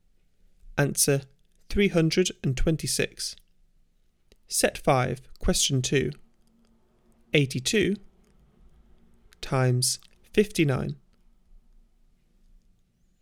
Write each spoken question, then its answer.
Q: 82 times 59.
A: Answer 4838.